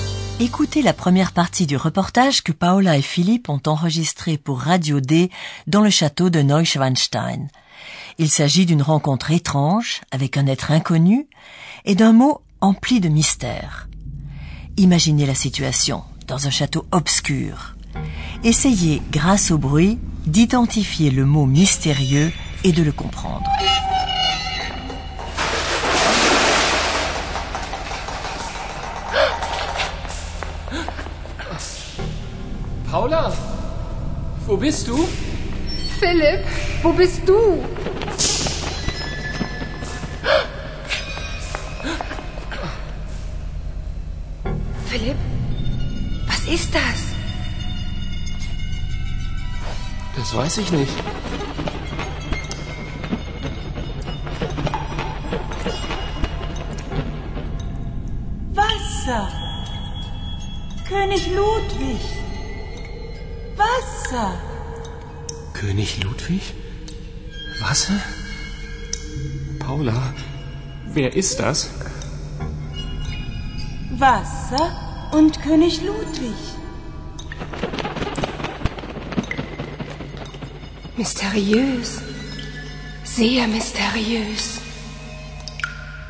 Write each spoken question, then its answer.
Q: Essayez, grâce au bruit, d'identifier le mot mystérieux et de le comprendre.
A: Le mot mystérieux, chers auditeurs, était eau.